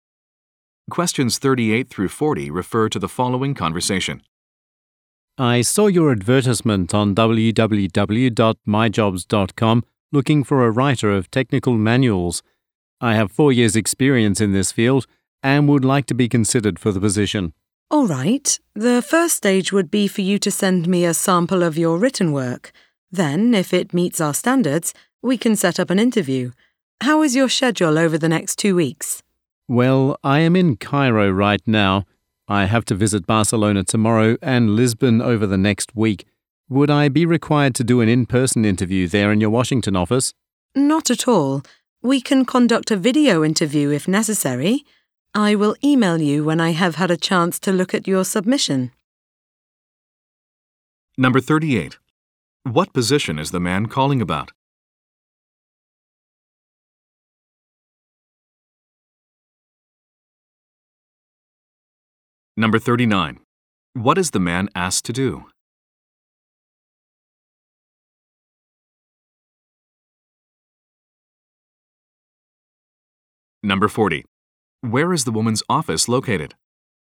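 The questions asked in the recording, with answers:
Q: What position is the man calling about?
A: Writer of technical manuals

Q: What is the man asked to do?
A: Send a sample of his written work

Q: Where is the woman's office located?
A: Washington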